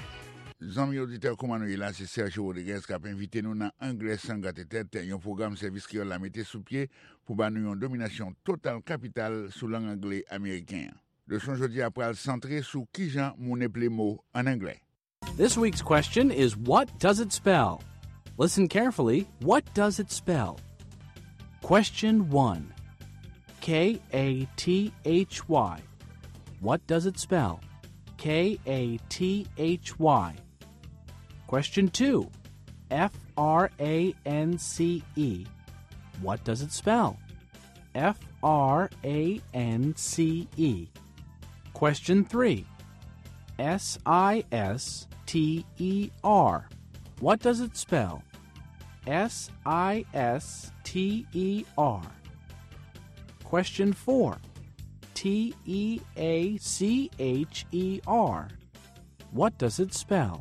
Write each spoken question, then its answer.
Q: K-A-T-H-Y. What does it spell?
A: That spells Kathy.

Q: France. What does it spell?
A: it spells France.

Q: Sister. What does it spell?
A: it spells sister.